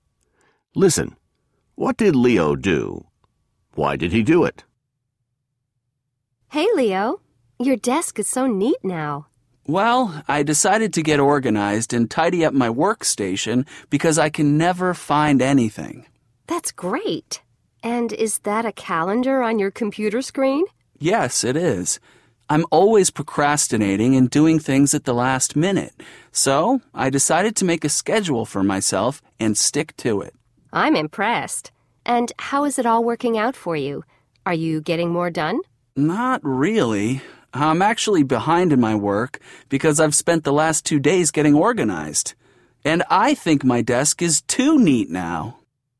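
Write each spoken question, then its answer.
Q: What did Leo do?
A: He tidied up his workstation and made a schedule for himself.

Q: Why did he do it?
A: Because he could never find anything and was always procrastinating.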